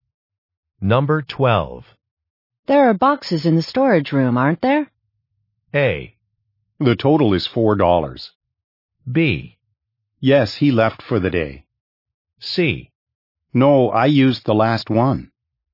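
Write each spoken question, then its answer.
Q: There are boxes in the storage room, aren't there?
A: C: No, I used the last one.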